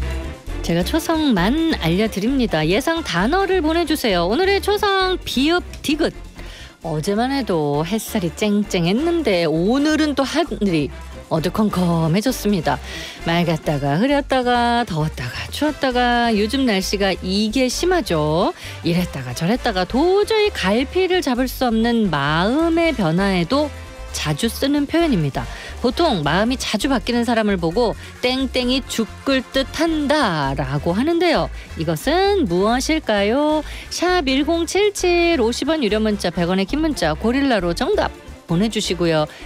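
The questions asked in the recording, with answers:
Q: 이것은 무엇일까요?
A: 변덕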